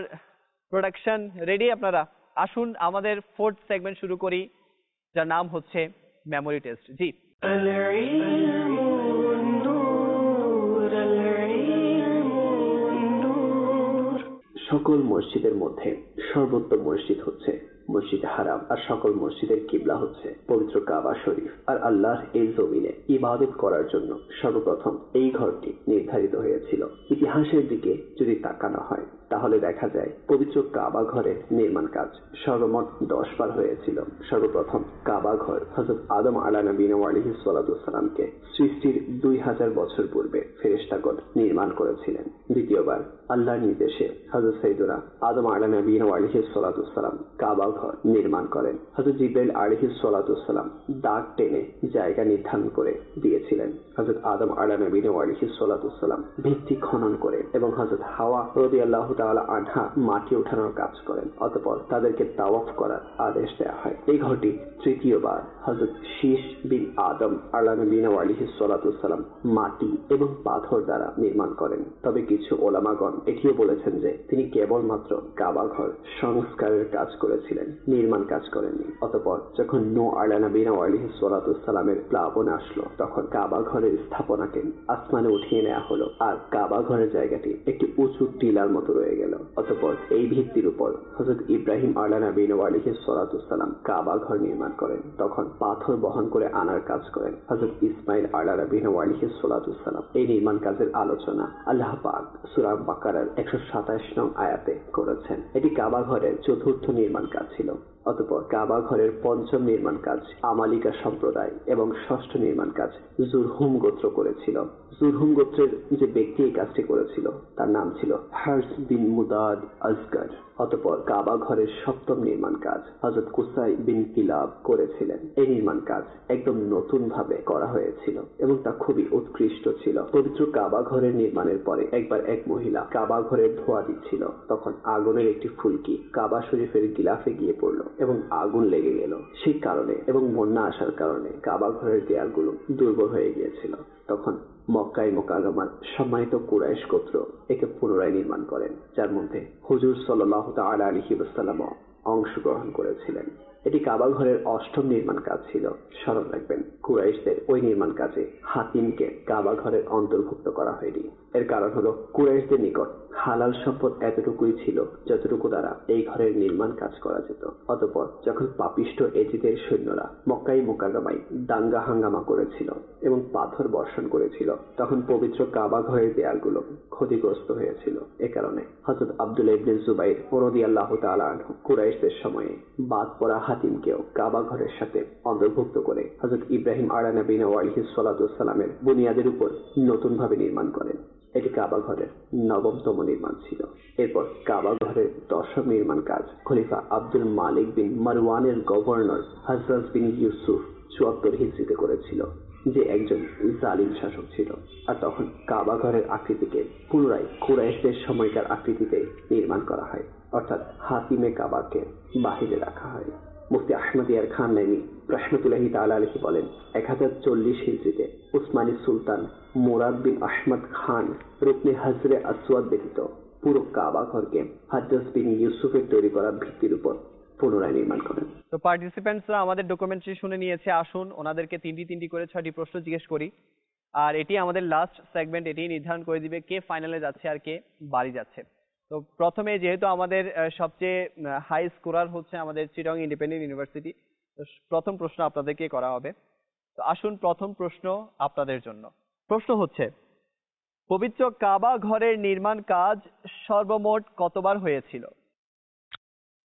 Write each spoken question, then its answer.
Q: পবিত্র কাবা ঘরের নির্মাণ কাজ সর্বমোট কতবার হয়েছিল?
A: সঠিক উত্তর হচ্ছে পবিত্র কাবা ঘরের নির্মাণ কাজ সর্বমোট 10 বার হয়েছিল।